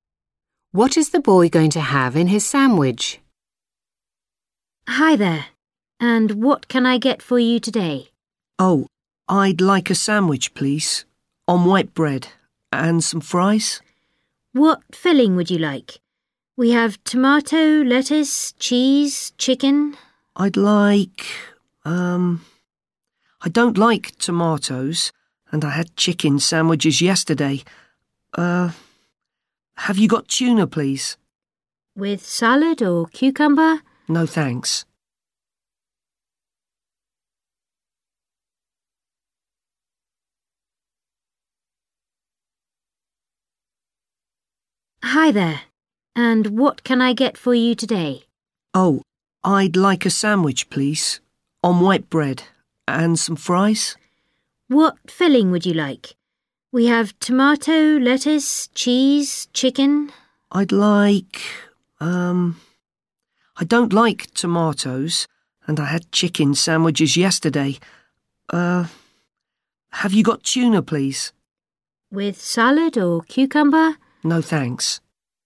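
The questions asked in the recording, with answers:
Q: What is the boy going to have in his sandwich?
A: Tuna (only)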